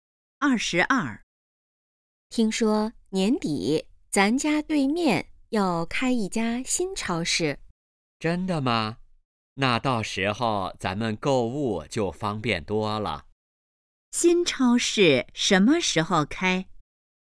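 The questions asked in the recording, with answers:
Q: 新超市什么时候开?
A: 年底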